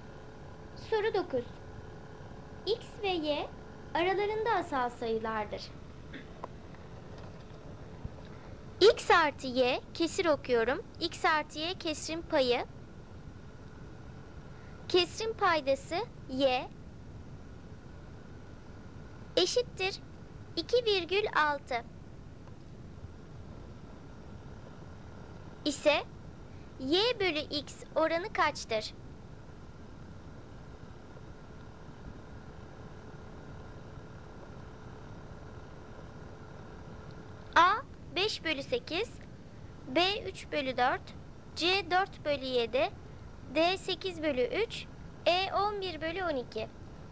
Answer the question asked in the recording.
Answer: Doğru cevap A 5 bölü 8.